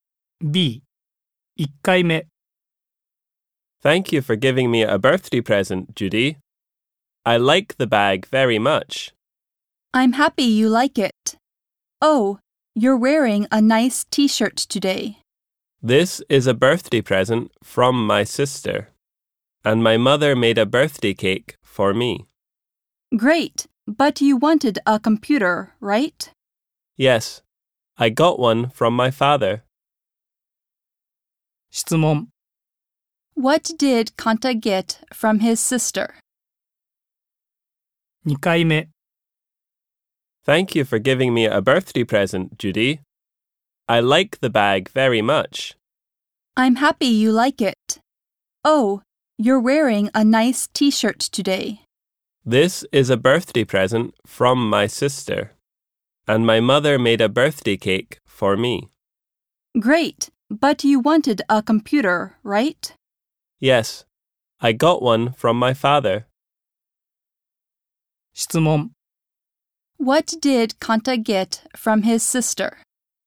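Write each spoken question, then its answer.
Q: What did Kanta get from his sister?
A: A T-shirt.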